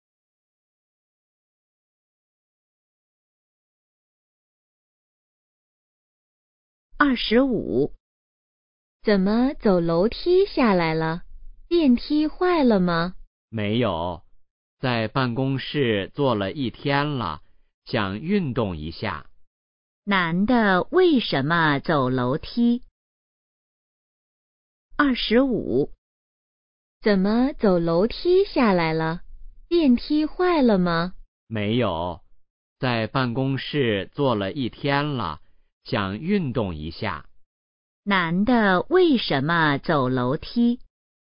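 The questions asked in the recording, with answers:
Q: 男的为什么走楼梯?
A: 想运动一下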